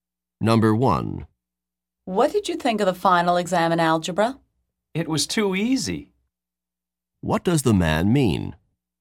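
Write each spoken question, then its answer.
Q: What does the man mean?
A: The algebra exam was very simple.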